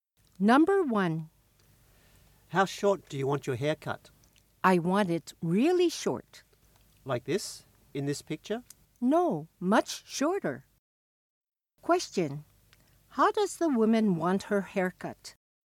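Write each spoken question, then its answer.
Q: How does the woman want her haircut?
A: Really short, much shorter than in the picture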